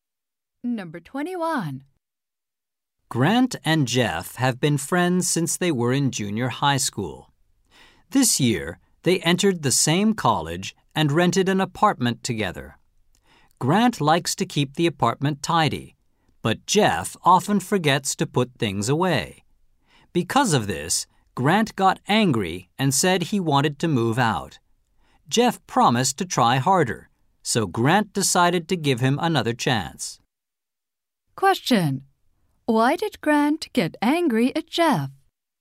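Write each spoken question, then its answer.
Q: Why did Grant get angry at Jeff?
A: Jeff often forgot to put things away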